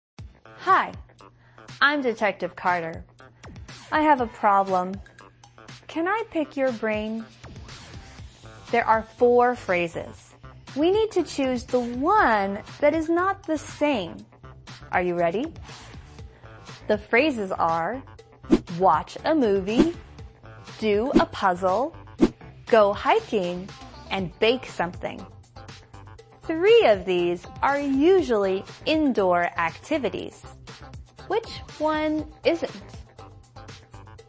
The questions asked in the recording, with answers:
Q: Which one isn't?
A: It's go hiking.